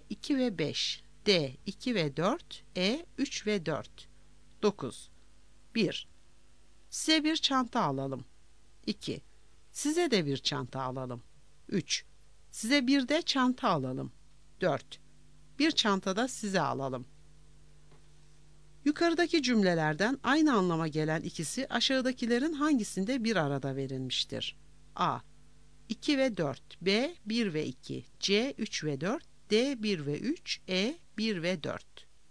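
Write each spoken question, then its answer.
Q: Yukarıdaki cümlelerden aynı anlama gelen ikisi aşağıdakilerin hangisinde bir arada verilmiştir?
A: A: 2 ve 4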